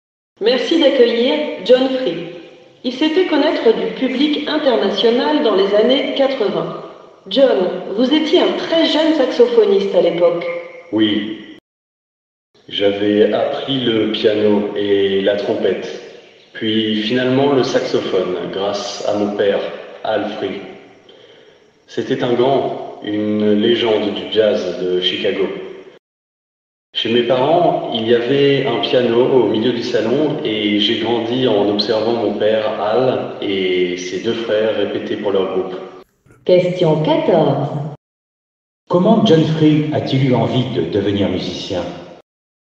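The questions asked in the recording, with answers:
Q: Comment John Free a-t-il eu envie de devenir musicien ?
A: En regardant son père, Al Free, et ses deux oncles répéter à la maison pour leur groupe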